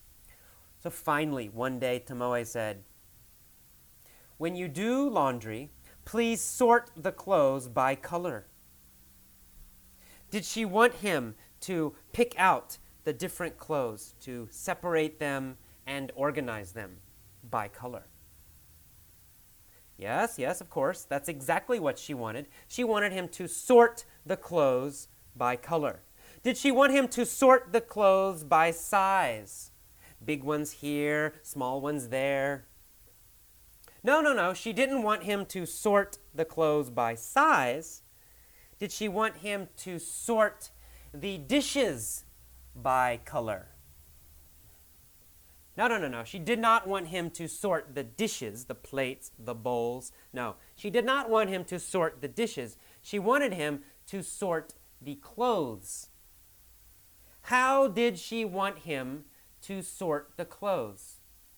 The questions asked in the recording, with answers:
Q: How did she want him to sort the clothes?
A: Well, she wanted him to sort the clothes by color.